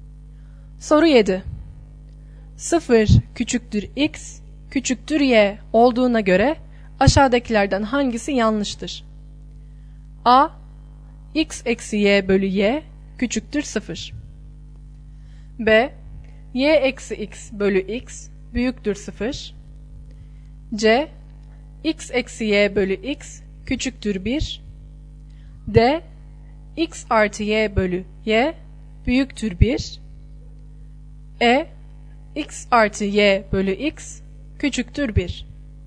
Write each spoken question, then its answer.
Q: 0 küçüktür X küçüktür Y olduğuna göre aşağıdakilerden hangisi yanlıştır?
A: Doğru yanıt E şıkkı.